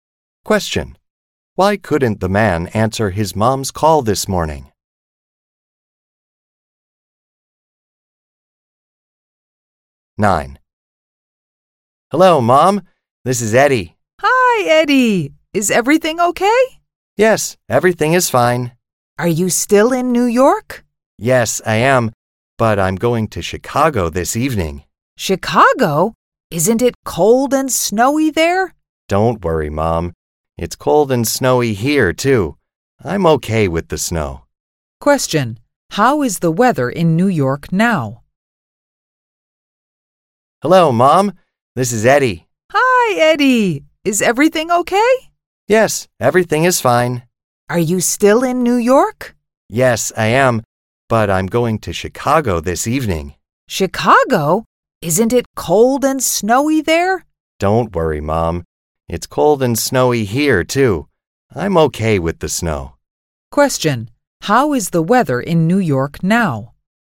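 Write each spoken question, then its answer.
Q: How is the weather in New York now?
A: Cold and snowy.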